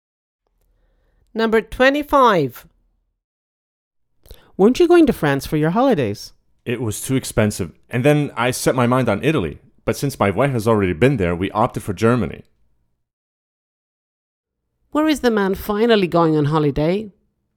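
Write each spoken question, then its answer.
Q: Where is the man finally going on holiday?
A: Germany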